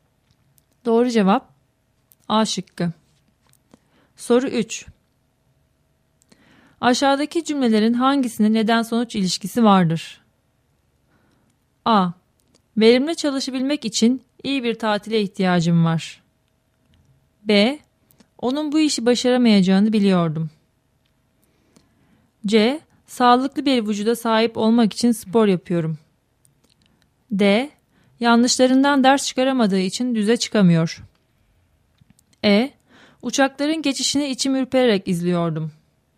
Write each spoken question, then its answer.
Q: Aşağıdaki cümlelerin hangisinde neden-sonuç ilişkisi vardır?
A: Doğru cevap D şıkkı.